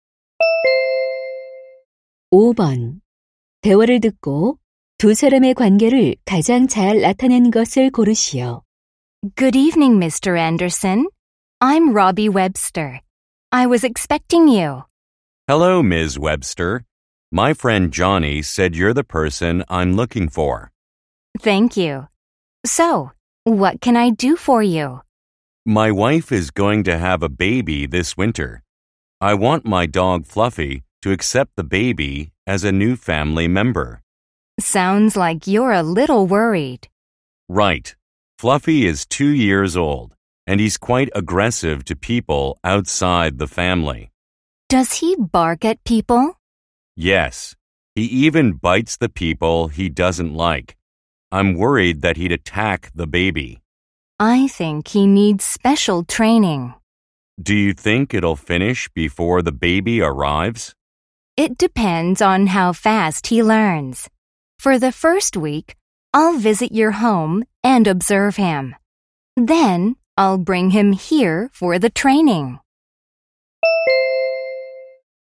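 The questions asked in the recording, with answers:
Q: 대화를 듣고 두 사람의 관계를 가장 잘 나타낸 것을 고르시오.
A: 반려견 훈련사 - 개 주인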